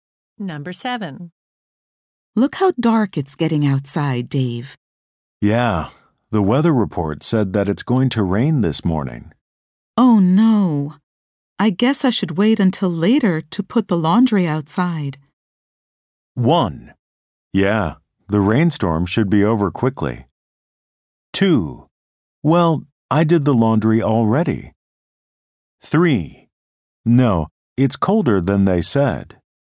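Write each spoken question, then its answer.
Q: Oh no. I guess I should wait until later to put the laundry outside.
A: 1: Yeah, the rainstorm should be over quickly.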